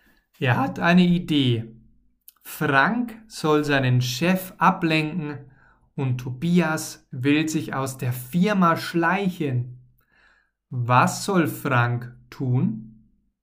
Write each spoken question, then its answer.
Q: Was soll Frank tun?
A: Er soll seinen Chef ablenken.